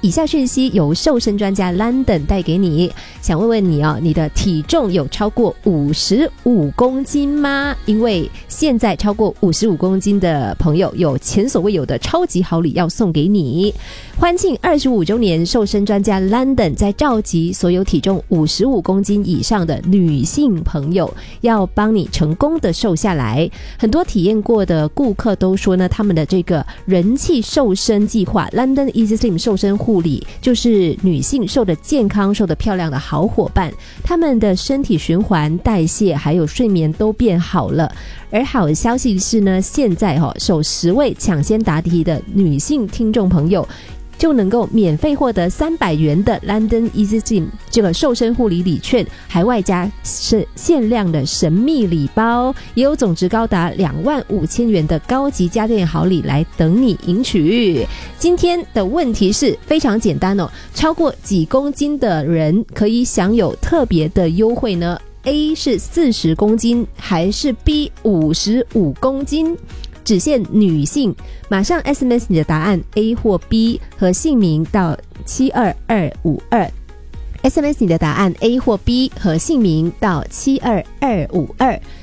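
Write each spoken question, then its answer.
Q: 超过几公斤的人可以享有特别的优惠呢?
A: B: 55公斤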